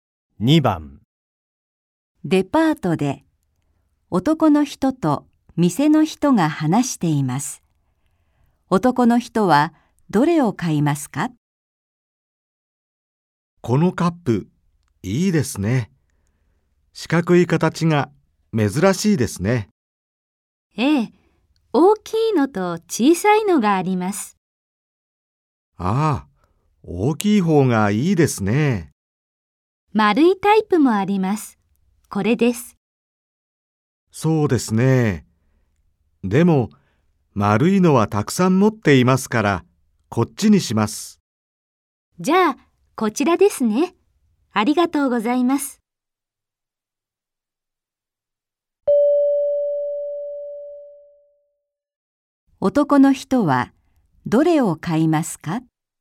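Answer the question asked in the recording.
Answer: 四角い大きいカップ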